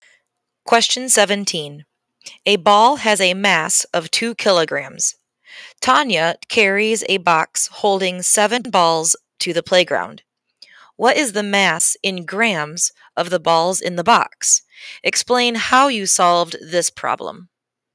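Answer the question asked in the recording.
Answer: 14,000 grams (7 × 2 kg = 14 kg = 14,000 g)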